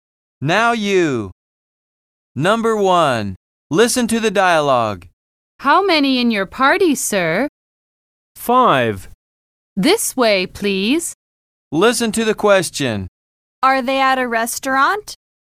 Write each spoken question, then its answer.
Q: Are they at a restaurant?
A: Yes, they are.